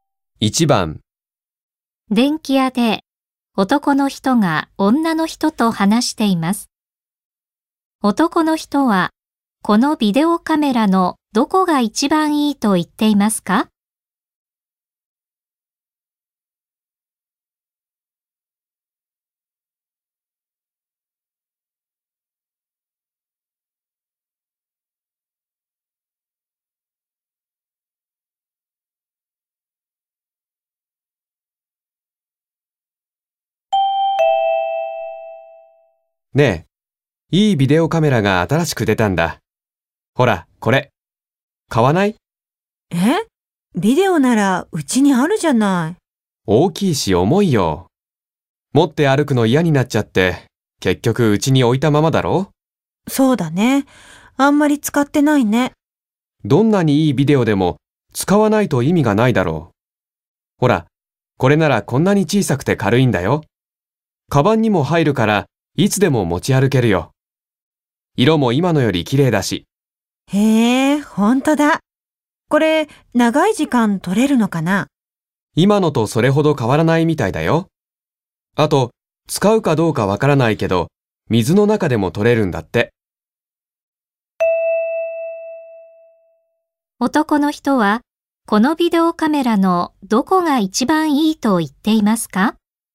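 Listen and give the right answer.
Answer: 小さくて軽いので、いつでも持ち歩けるところ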